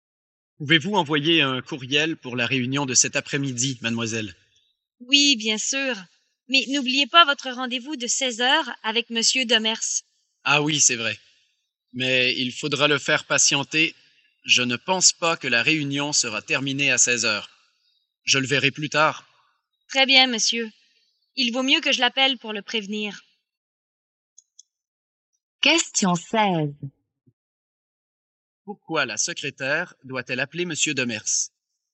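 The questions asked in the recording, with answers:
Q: Pourquoi la secrétaire doit-elle appeler Monsieur Demers ?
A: Pour le prévenir que la réunion finira après 16h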